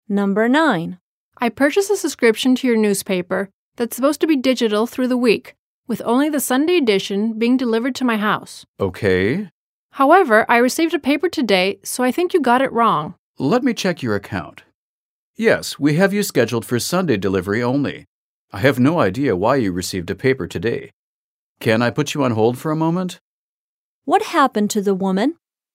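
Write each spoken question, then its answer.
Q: What happened to the woman?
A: She got a paper delivered today even though her subscription is only for Sunday delivery.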